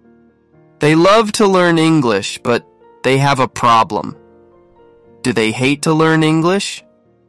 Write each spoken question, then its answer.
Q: Do they hate to learn English?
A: No, they don't. They don't hate to learn it.